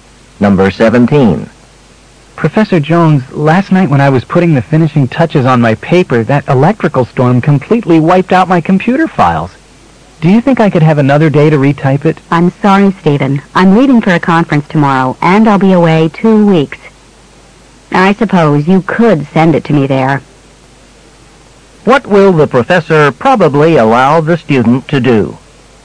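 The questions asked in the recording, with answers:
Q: What will the professor probably allow the student to do?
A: Send the paper to her at the conference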